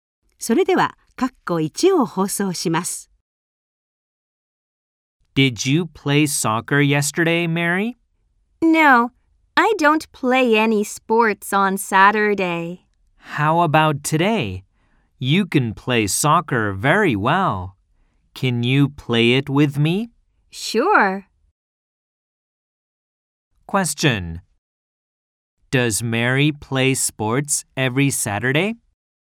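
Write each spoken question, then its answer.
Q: Question. Does Mary play sports every Saturday?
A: No, she doesn't.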